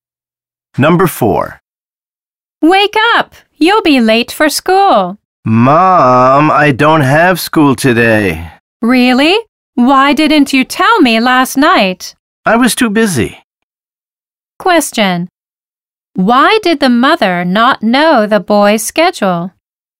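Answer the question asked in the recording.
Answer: He was too busy to tell her.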